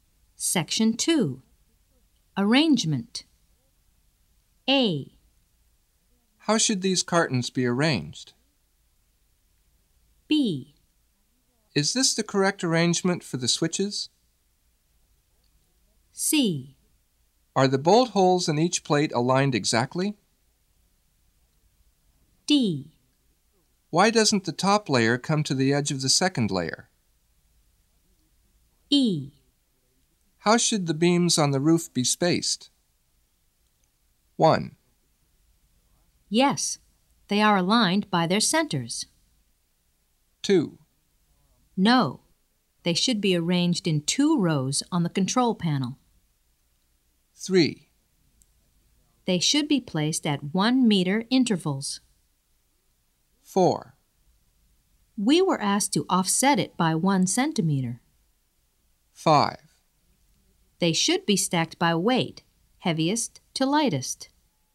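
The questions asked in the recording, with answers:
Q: How should these cartons be arranged?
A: 5: They should be stacked by weight, heaviest to lightest.

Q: Is this the correct arrangement for the switches?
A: 2: No, they should be arranged in two rows on the control panel.

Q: Are the bolt holes in each plate aligned exactly?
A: 1: Yes, they are aligned by their centers.

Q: Why doesn't the top layer come to the edge of the second layer?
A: 4: We were asked to offset it by 1 centimeter.

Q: How should the beams on the roof be spaced?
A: 3: They should be placed at 1 meter intervals.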